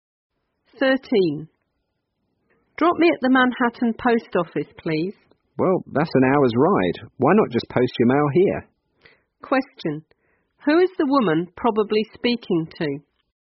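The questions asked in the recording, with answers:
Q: Who is the woman probably speaking to?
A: A taxi driver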